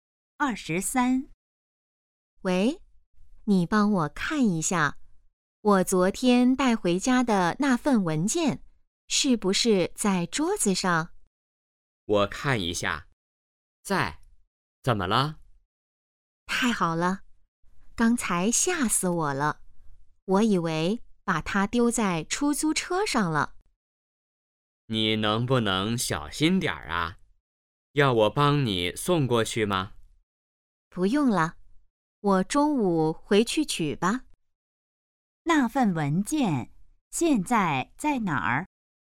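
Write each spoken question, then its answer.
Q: 那份文件现在在哪儿?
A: 在家里桌子上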